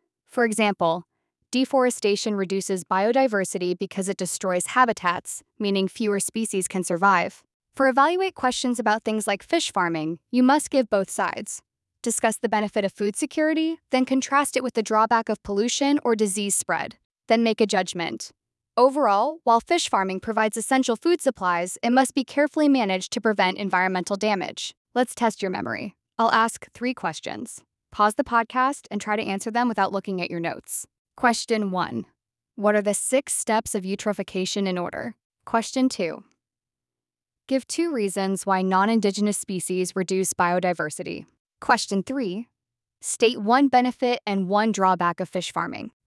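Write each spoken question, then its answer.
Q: State 1 benefit and 1 drawback of fish farming.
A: Benefit: food security (essential food supply); drawback: pollution or disease spread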